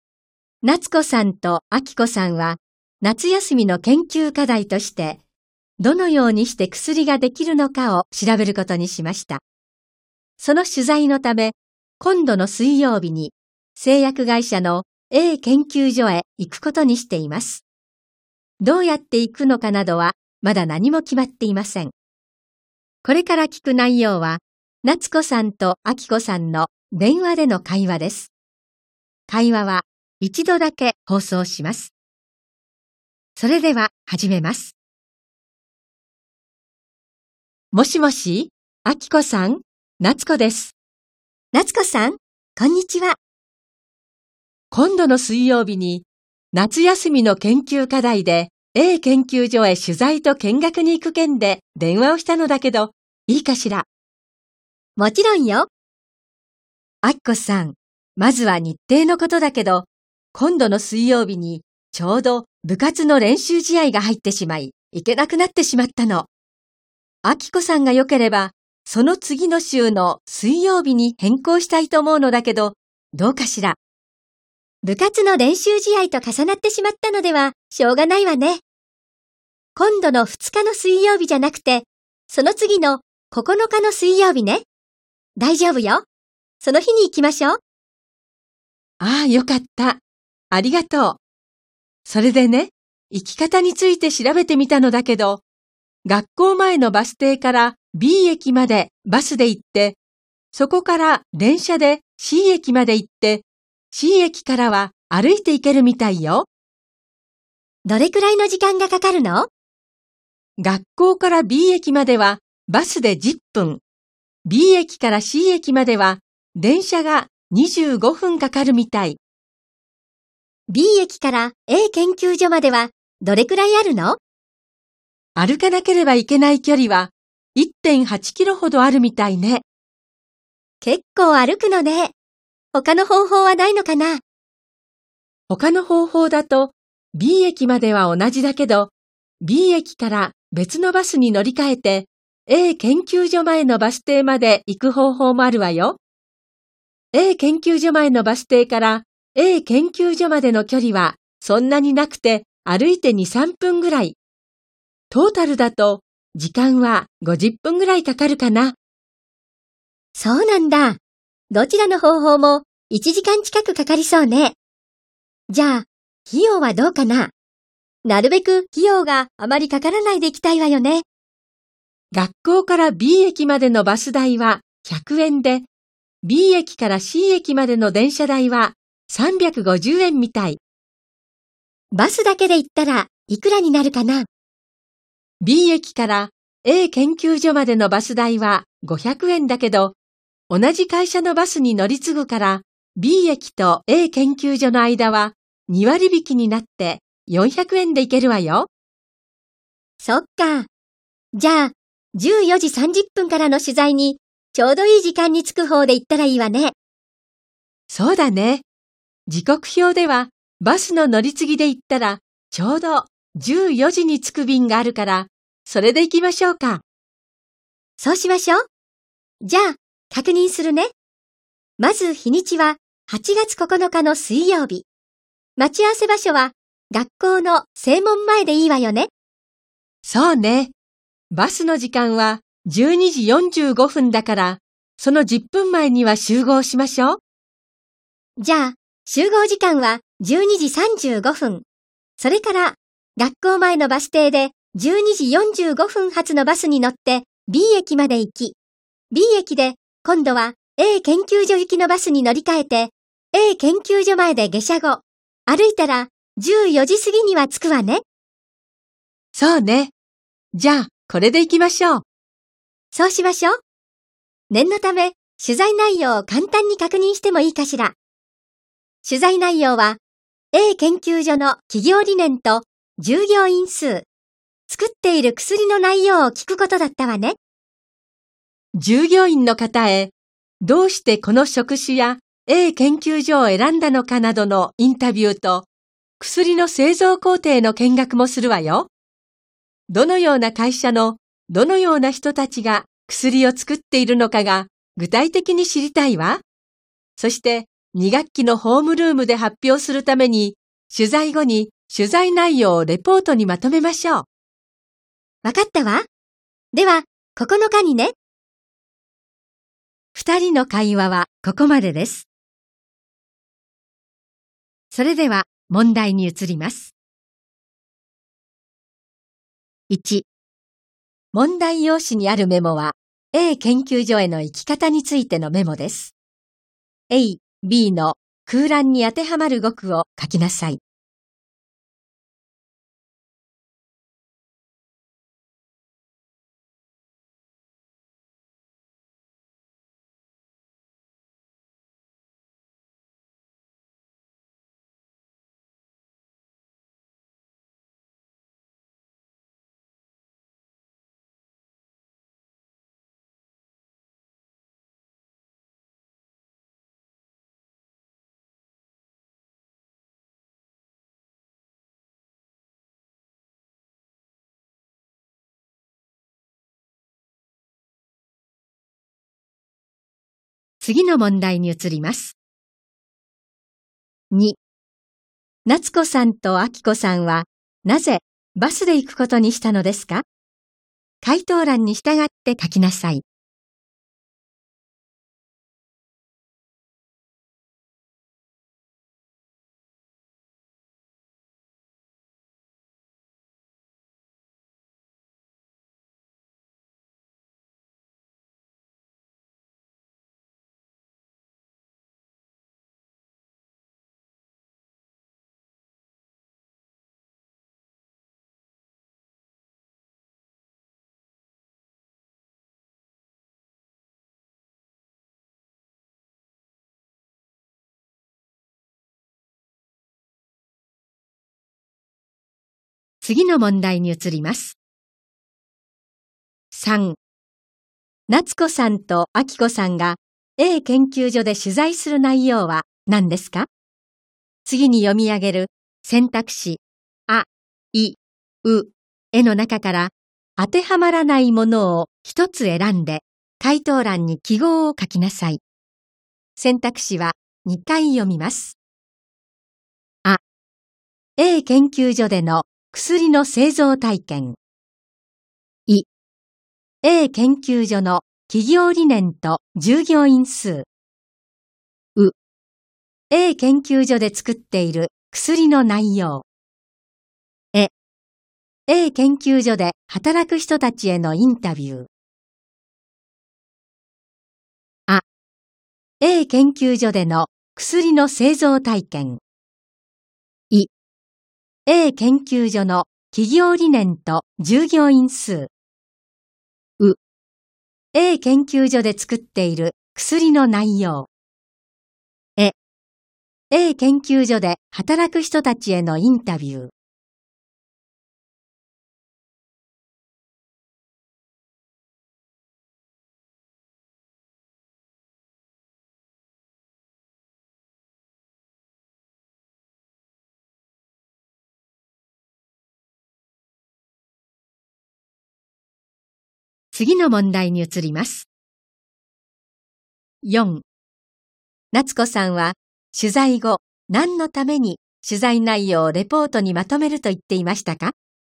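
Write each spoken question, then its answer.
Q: 夏子さんと明子さんは、なぜバスで行くことにしたのですか?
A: 14時30分からの取材にちょうどいい時間(14時)に着くから

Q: 夏子さんと明子さんが A 研究所で取材する内容は何ですか?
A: あ: A 研究所での薬の製造体験。

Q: 夏子さんは取材後何のために取材内容をレポートにまとめると言っていましたか?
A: 2学期のホームルームで発表するため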